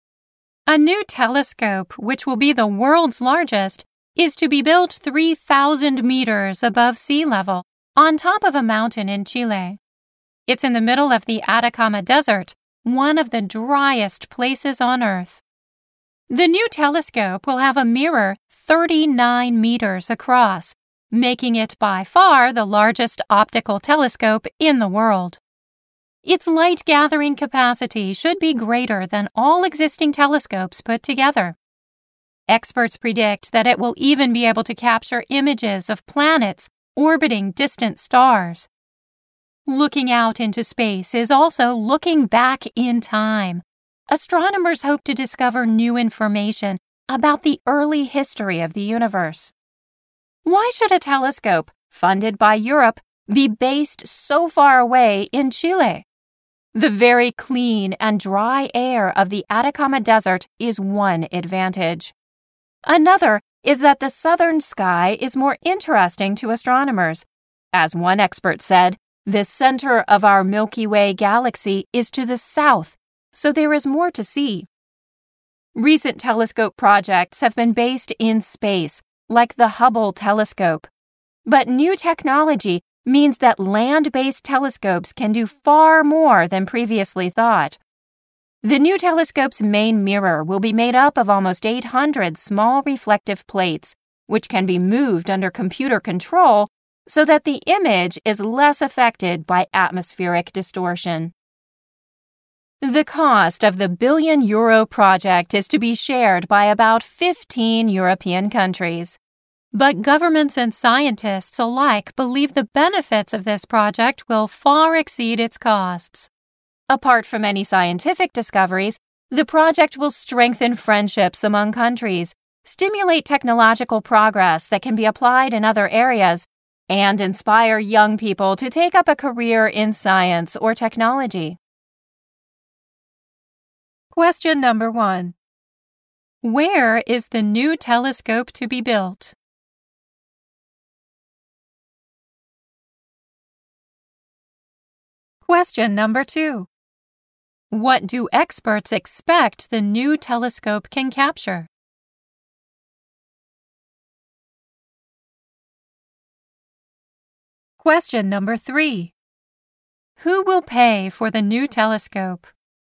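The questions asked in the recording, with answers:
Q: Where is the new telescope to be built?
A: On top of a mountain in Chile, in the Atacama Desert, 3,000 meters above sea level.

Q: What do experts expect the new telescope can capture?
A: Images of planets orbiting distant stars.

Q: Who will pay for the new telescope?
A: About 15 European countries.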